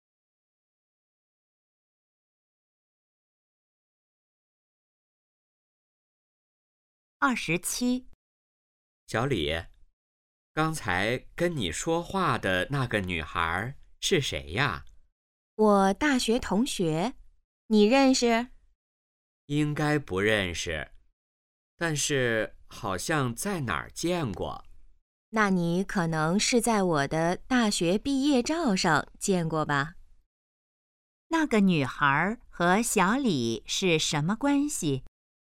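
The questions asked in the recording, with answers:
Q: 那个女孩和小李是什么关系?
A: 大学同学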